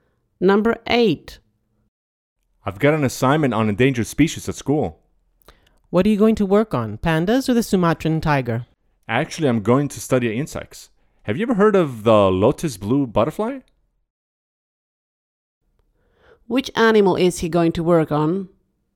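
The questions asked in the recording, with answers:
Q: Which animal is he going to work on?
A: the lotus blue butterfly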